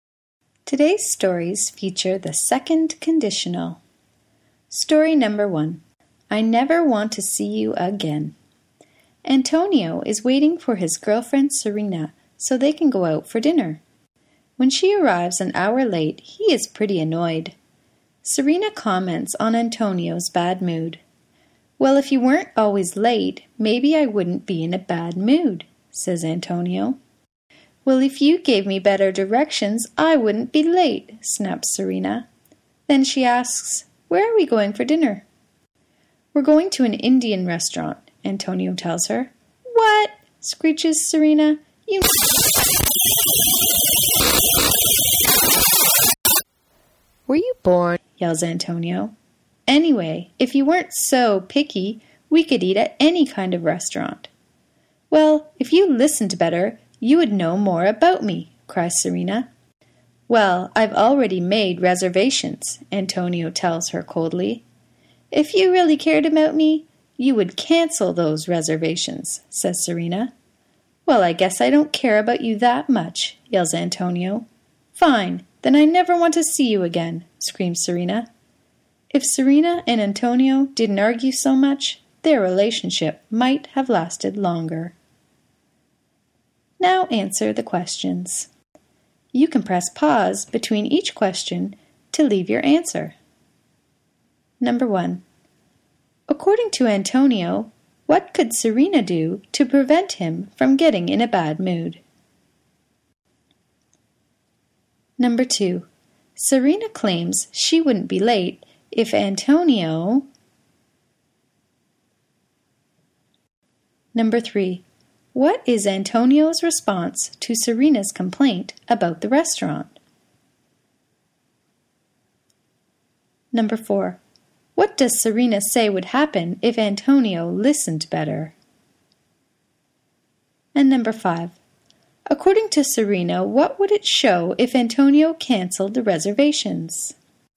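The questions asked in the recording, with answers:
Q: According to Antonio, what could Serena do to prevent him from getting in a bad mood?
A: Stop always being late

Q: Serena claims she wouldn't be late if Antonio...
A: gave her better directions

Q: what does Serena say would happen if Antonio listened better?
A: He would know more about her

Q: according to Serena, what would it show if Antonio canceled the reservations?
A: That he really cared about her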